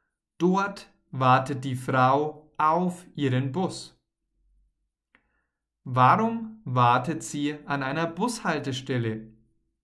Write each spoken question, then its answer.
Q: Warum wartet sie an einer Bushaltestelle?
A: Sie wartet auf ihren Bus.